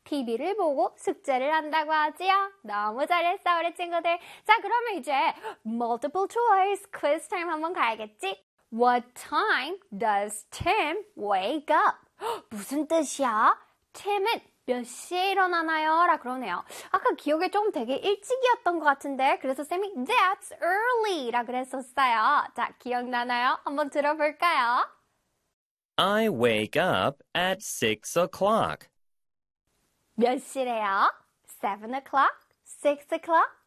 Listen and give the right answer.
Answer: 정답은 빠라밤! 6 o'clock 였습니다.